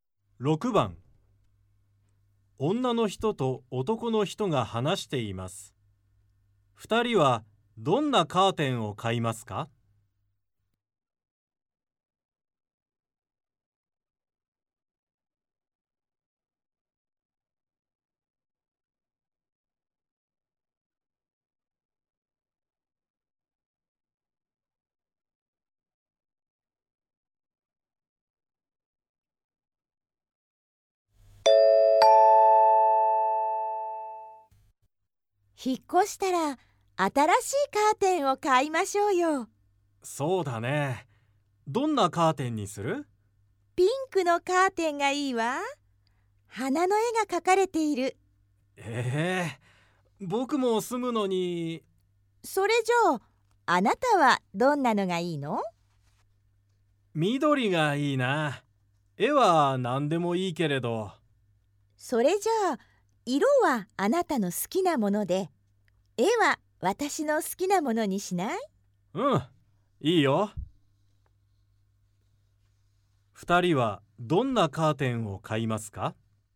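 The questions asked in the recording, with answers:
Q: 2人はどんなカーテンを買いますか?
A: 花の絵が描かれた緑のカーテン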